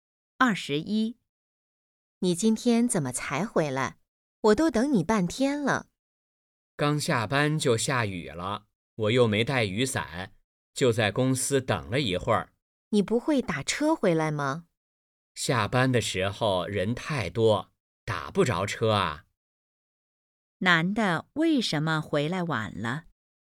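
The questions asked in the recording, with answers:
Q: 男的为什么回来晚了?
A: 下雨没带伞,在公司等了一会儿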